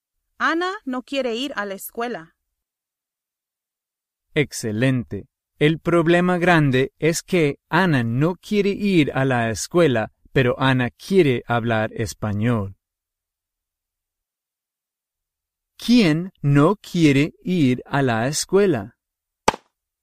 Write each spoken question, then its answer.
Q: ¿Quién no quiere ir a la escuela?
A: Ana.